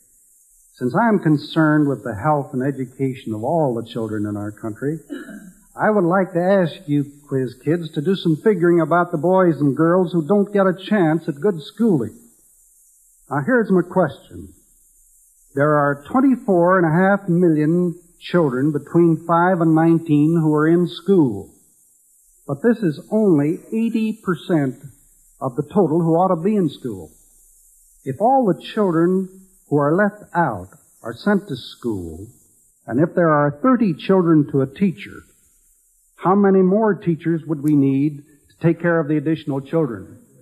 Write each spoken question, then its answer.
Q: If all the children who are left out are sent to school, and if there are 30 children to a teacher, how many more teachers would we need to take care of the additional children?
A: 204,167.